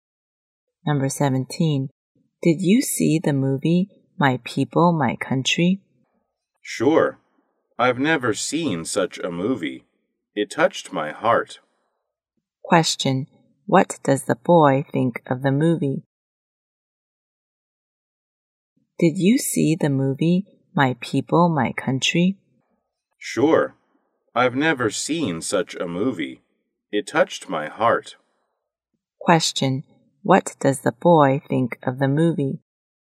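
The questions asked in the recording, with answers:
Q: What does the boy think of the movie?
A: Touching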